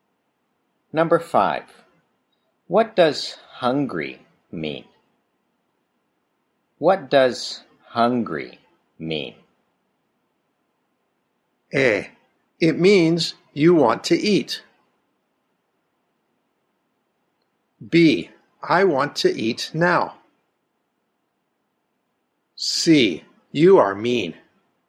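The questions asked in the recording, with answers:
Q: What does hungry mean?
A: A: It means you want to eat.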